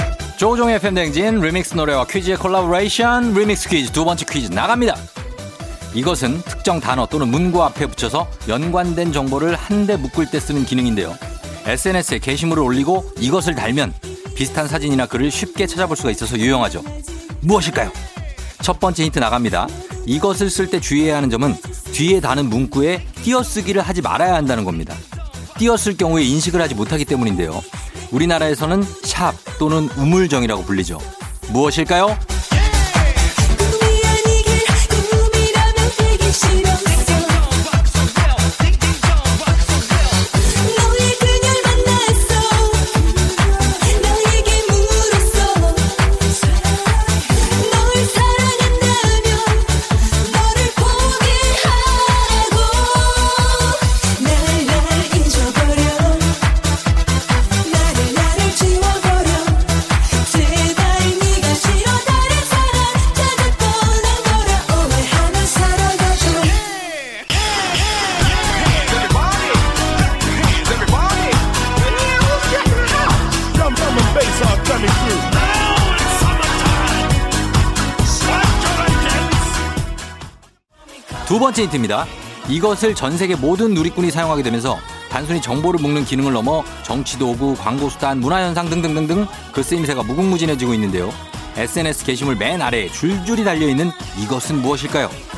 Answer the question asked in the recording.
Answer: 해시태그죠